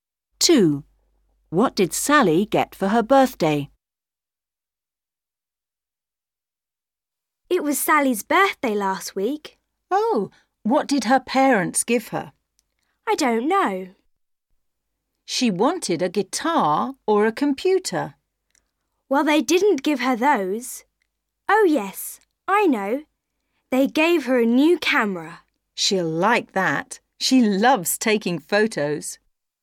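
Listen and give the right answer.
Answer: a new camera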